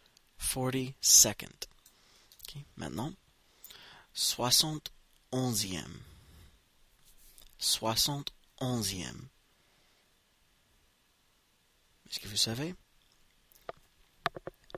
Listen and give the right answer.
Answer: 71st. 71st.